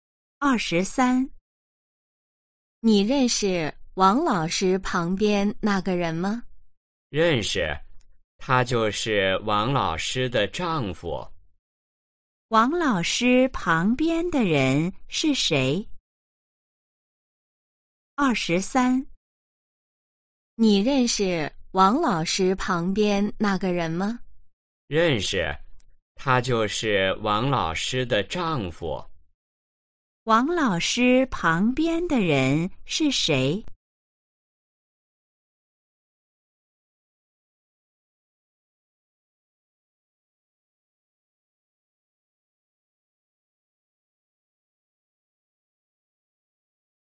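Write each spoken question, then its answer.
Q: 王老师旁边的人是谁?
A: 王老师的丈夫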